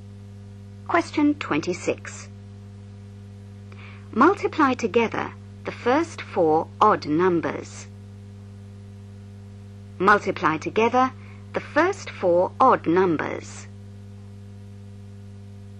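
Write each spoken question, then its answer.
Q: Multiply together the first four odd numbers.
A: 105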